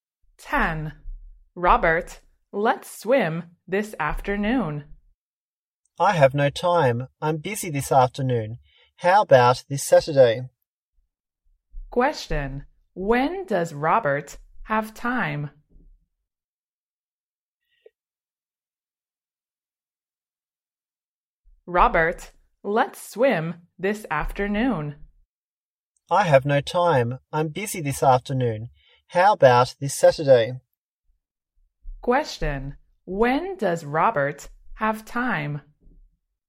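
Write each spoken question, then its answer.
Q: when does Robert have time?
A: this Saturday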